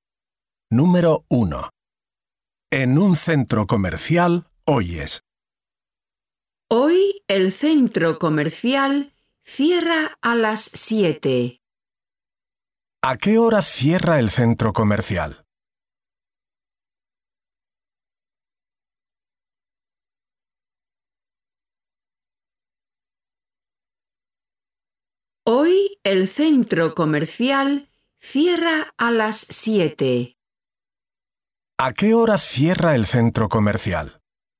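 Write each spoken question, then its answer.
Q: ¿A qué hora cierra el centro comercial?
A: A las 7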